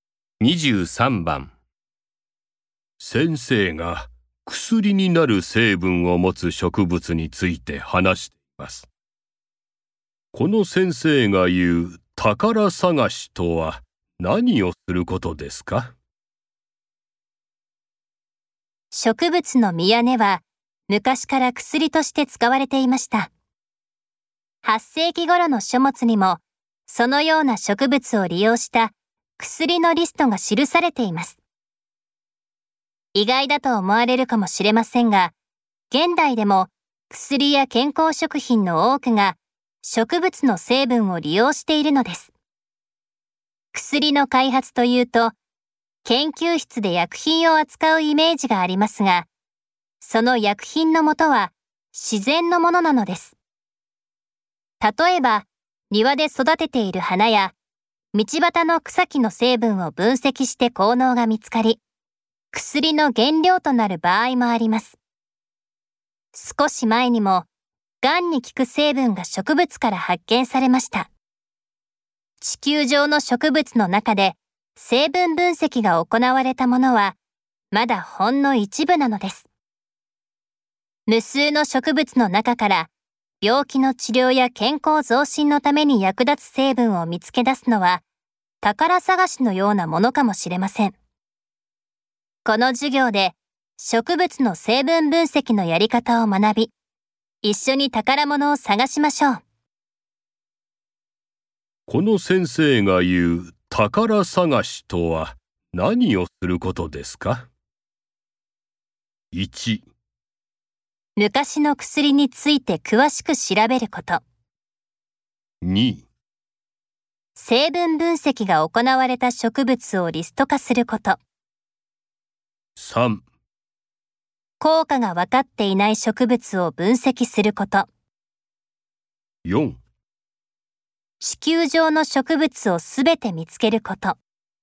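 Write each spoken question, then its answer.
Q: この先生が言う宝探しとは何をすることですか?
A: 3: 効果が分かっていない植物を分析すること。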